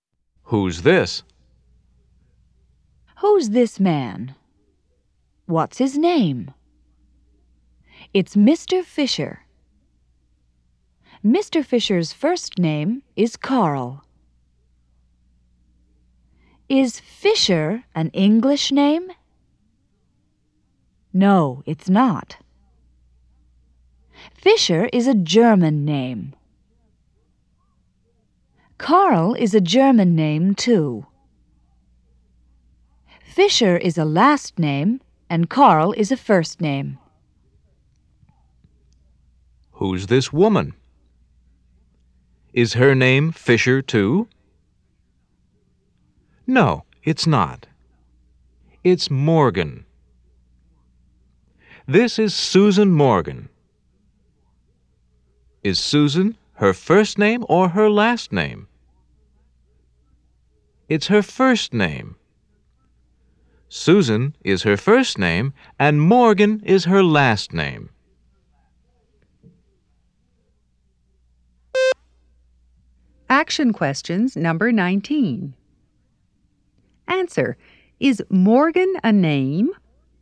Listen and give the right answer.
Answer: Yes, it is.